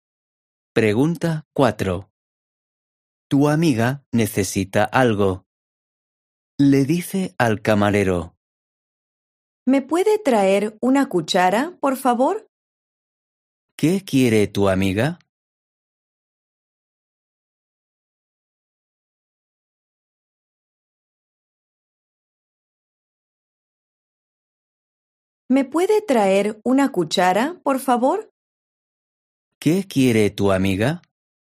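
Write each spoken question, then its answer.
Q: ¿Qué quiere tu amiga?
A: Una cuchara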